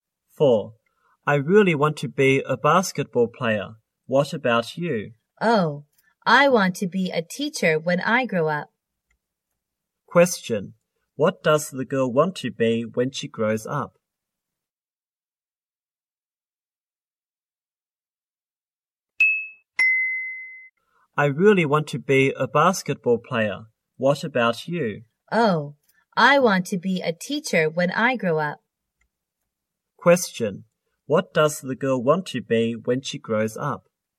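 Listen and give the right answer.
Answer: A teacher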